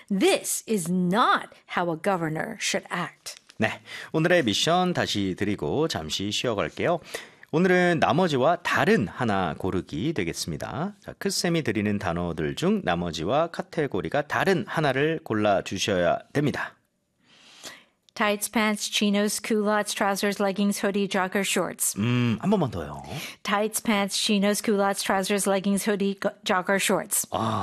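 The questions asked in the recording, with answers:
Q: 자, 크쌤이 드리는 단어들 중 나머지와 카테고리가 다른 하나를 골라주셔야 됩니다.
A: hoodie (후드티, 상의)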